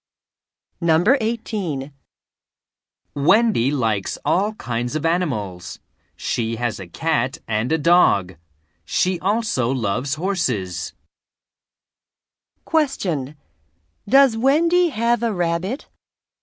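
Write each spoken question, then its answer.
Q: Does Wendy have a rabbit?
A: No, she doesn't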